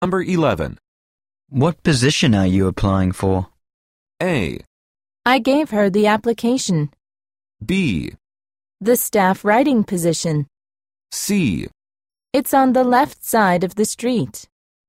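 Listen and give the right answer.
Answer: B: The staff writing position.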